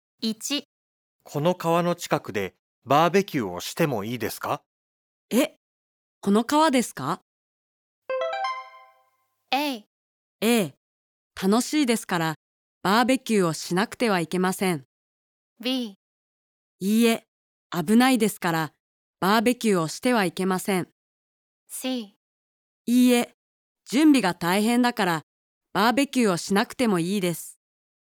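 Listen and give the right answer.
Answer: B: いいえ、危ないですからバーベキューをしてはいけません。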